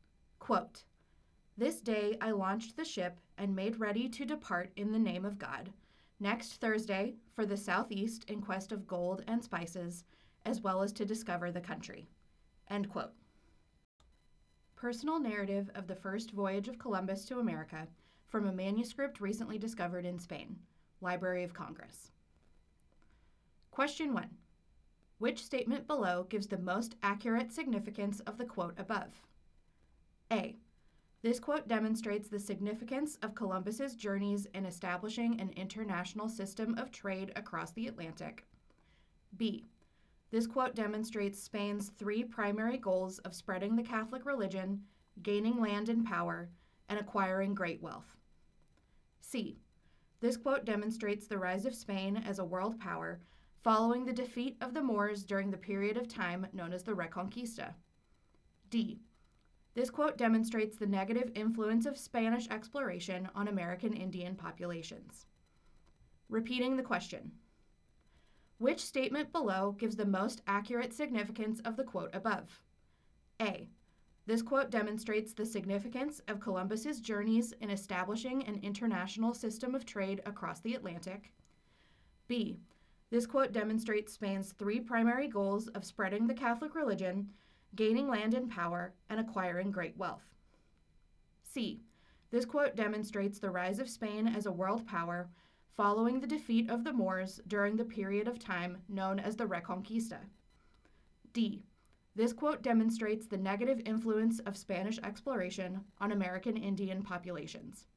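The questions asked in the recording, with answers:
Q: Which statement below gives the most accurate significance of the quote above?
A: B: This quote demonstrates Spain's three primary goals of spreading the Catholic religion, gaining land and power, and acquiring great wealth.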